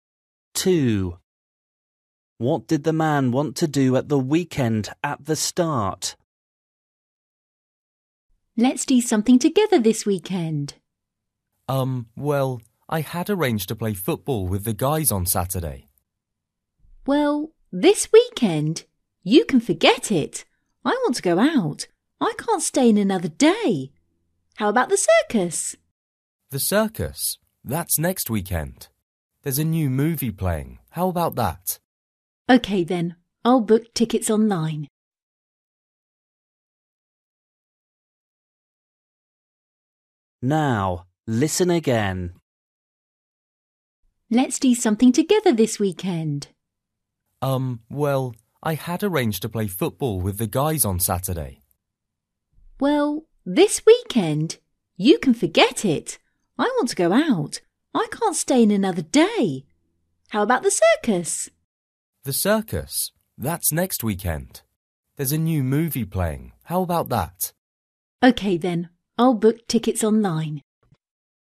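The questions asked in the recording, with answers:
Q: What did the man want to do at the weekend at the start?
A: Play football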